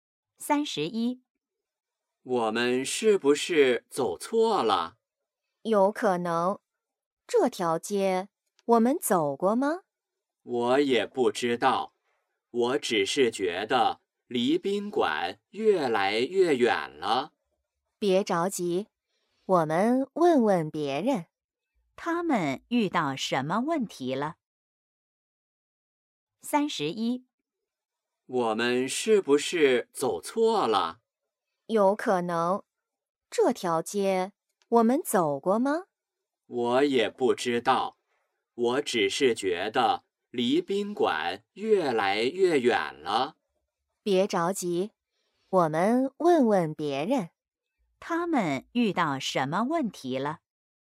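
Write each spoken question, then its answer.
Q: 他们遇到什么问题了。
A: 走错路了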